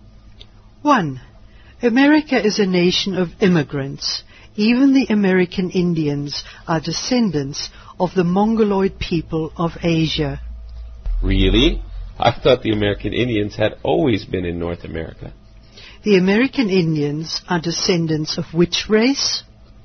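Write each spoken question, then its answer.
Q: The American Indians are descendants of which race?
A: The Mongoloid people of Asia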